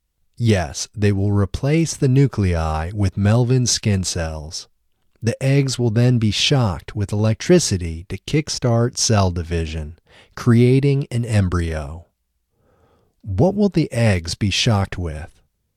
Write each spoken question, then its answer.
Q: what will the eggs be shocked with?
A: The eggs will be shocked with electricity.